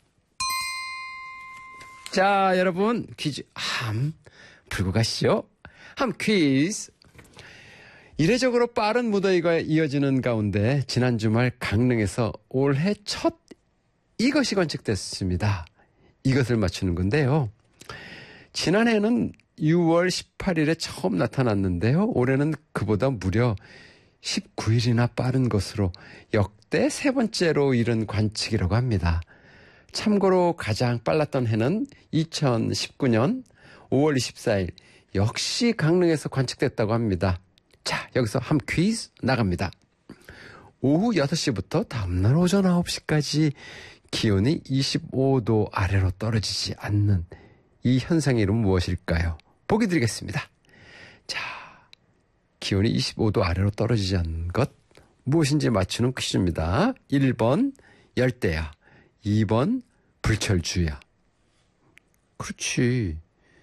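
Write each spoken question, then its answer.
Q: 오후 6시부터 다음날 오전 9시까지 기온이 25도 아래로 떨어지지 않는 이 현상의 이름은 무엇일까요?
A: 1번: 열대야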